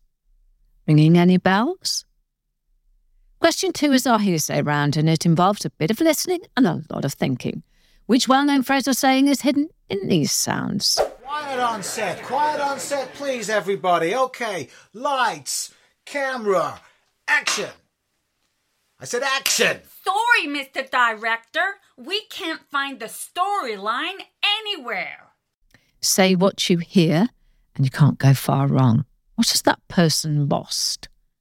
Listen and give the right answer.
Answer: The answer is lost the plot.